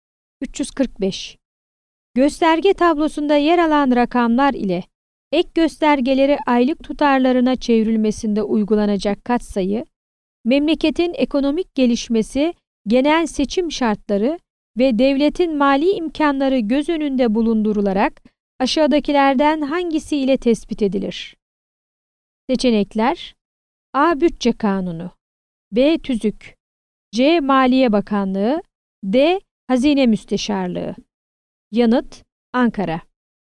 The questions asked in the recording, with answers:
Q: Gösterge tablosunda yer alan rakamlar ile ek göstergeleri aylık tutarlarına çevrilmesinde uygulanacak katsayı, memleketin ekonomik gelişmesi, genel seçim şartları ve devletin mali imkanları göz önünde bulundurularak aşağıdakilerden hangisi ile tespit edilir?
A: Yanıt: Ankara.